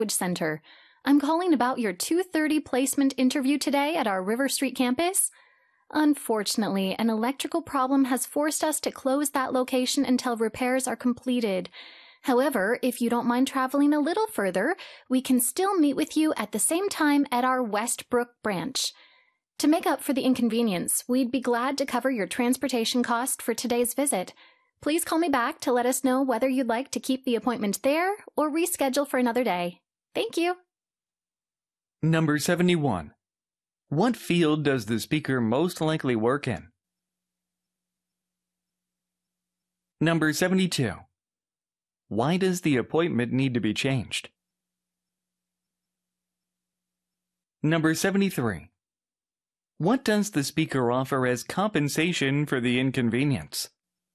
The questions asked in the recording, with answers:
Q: What field does the speaker most likely work in?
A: Language Education에서 일하는 사람이란 걸 알 수 있죠.

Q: Why does the appointment need to be changed?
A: One branch is temporarily closed for repairs.

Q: What does the speaker offer as compensation for the inconvenience?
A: Payment for transportation expenses.